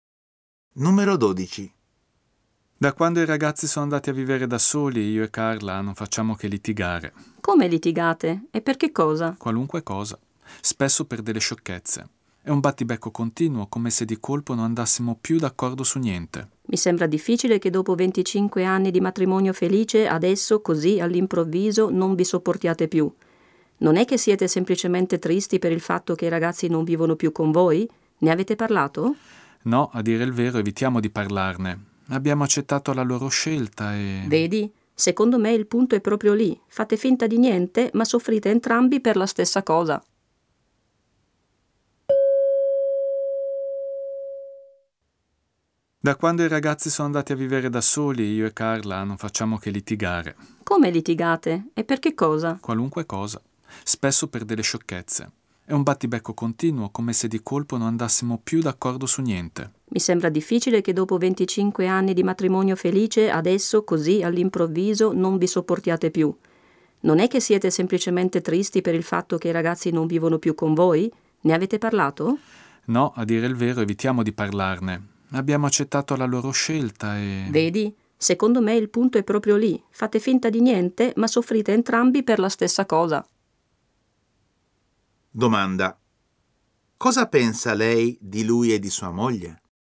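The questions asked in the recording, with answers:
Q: Cosa pensa lei di lui e di sua moglie?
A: Che soffrono entrambi perché i figli sono andati via di casa, ma non ne parlano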